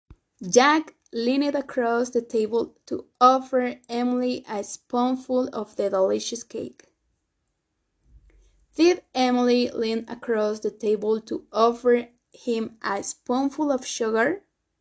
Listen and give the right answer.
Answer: No, no, Emily didn't lean across the table.